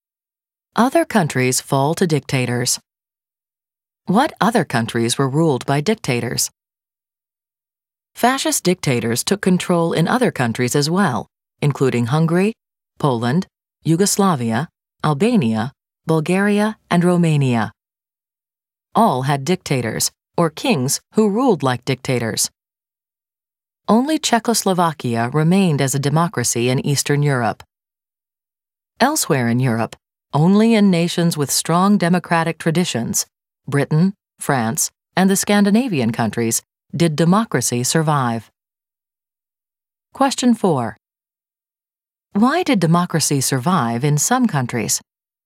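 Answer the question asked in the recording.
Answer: Because they had strong democratic traditions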